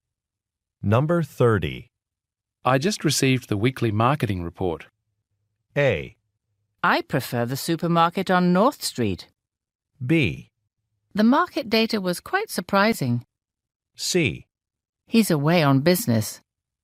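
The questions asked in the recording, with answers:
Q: I just received the weekly marketing report.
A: B: The market data was quite surprising.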